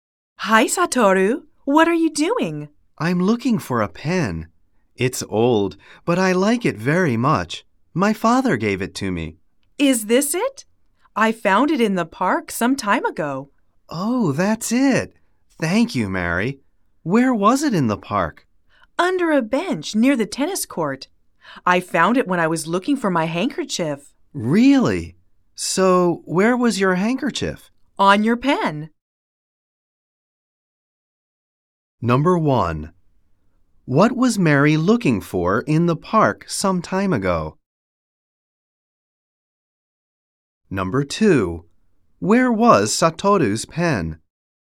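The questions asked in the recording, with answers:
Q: What was Mary looking for in the park some time ago?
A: Her handkerchief

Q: Where was Satoru's pen?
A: Under a bench near the tennis court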